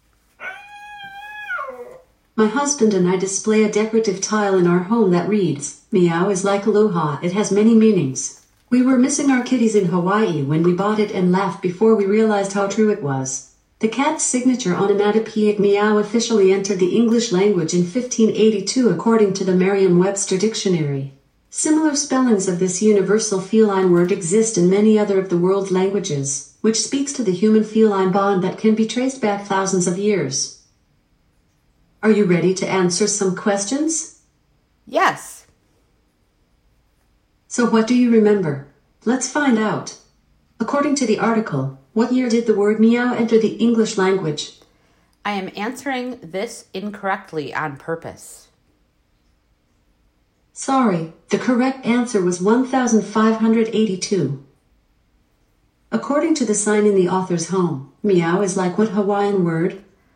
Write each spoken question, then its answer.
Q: According to the sign in the author's home, meow is like what Hawaiian word?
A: Yes, aloha is correct.